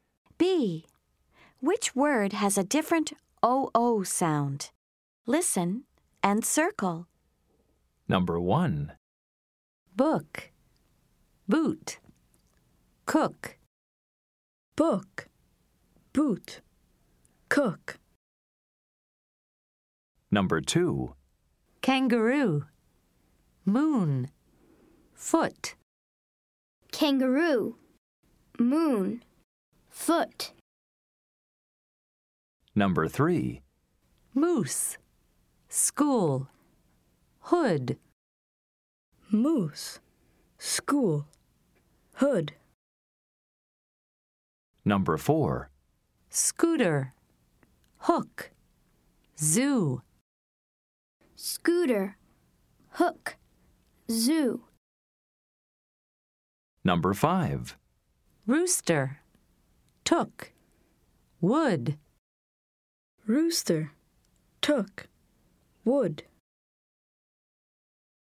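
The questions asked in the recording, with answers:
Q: Which word has a different OO sound?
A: Boot

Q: Which word has a different OO sound?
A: Foot

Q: Which word has a different OO sound?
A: Hood

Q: Which word has a different OO sound?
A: Hook

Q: Which word has a different OO sound?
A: Rooster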